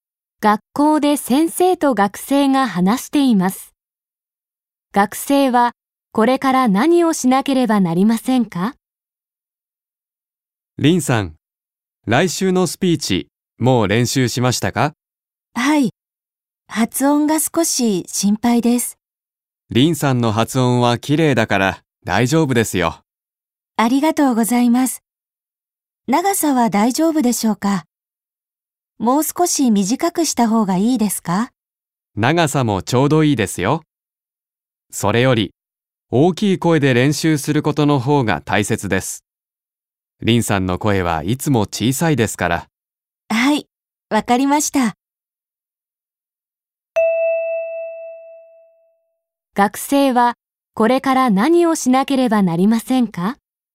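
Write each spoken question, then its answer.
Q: 学生はこれから何をしなければなりませんか?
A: 大きい声でスピーチの練習をする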